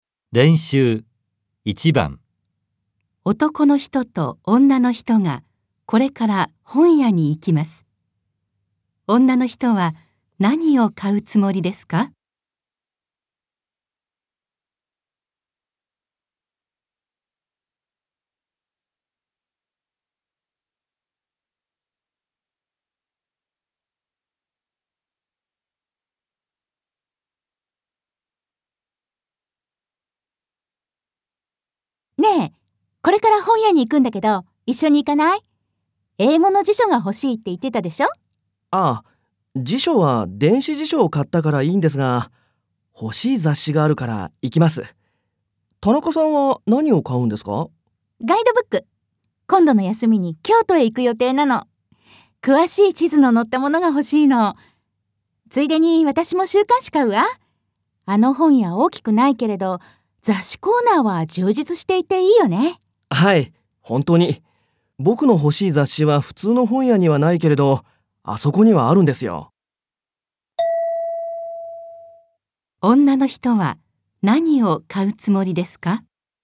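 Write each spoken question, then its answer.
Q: 女の人は何を買うつもりですか?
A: 京都のガイドブックと週刊誌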